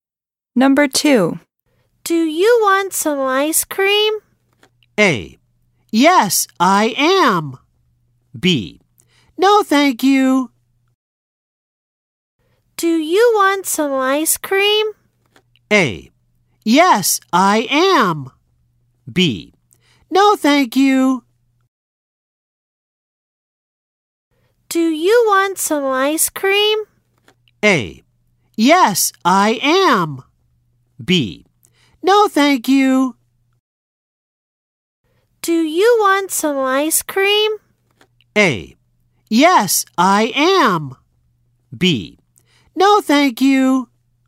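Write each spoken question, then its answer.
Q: Do you want some ice cream?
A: B: No, thank you.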